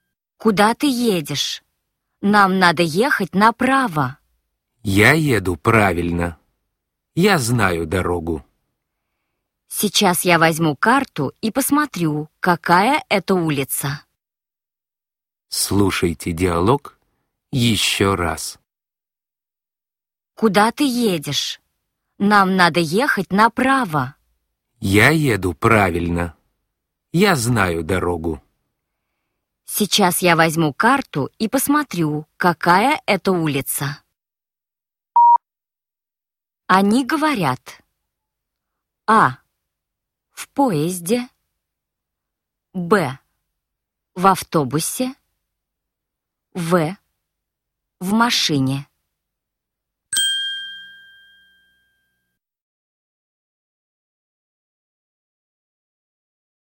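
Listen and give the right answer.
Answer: В: В машине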